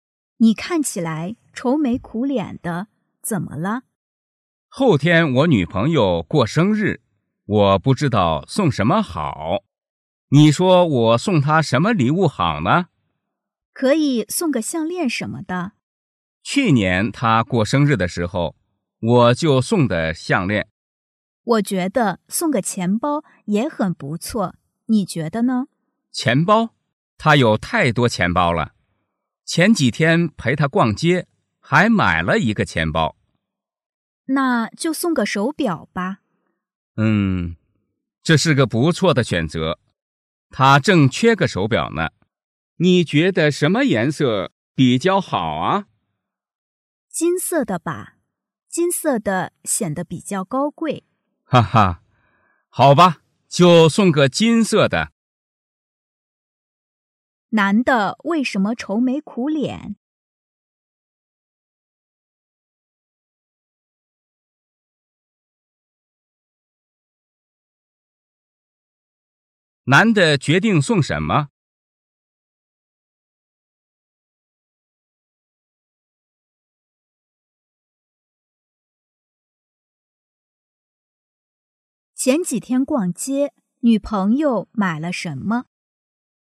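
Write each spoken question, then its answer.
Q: 男的为什么愁眉苦脸?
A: 不知道送女朋友什么生日礼物

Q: 男的决定送什么?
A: 金色的手表

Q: 前几天逛街,女朋友买了什么?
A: 钱包

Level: 汉语水平考试(MHK)三级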